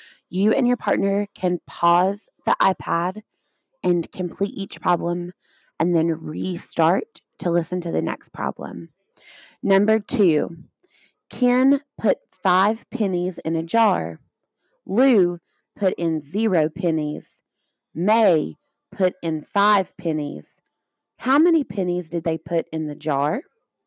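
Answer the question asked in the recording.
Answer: 10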